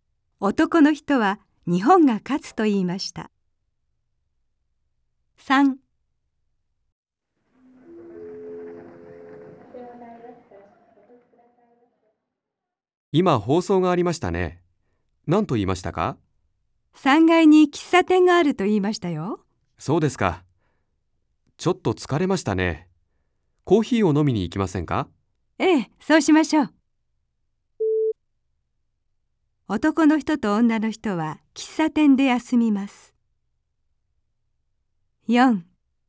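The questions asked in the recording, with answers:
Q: 男の人と女の人は喫茶店で休みます。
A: はい(○)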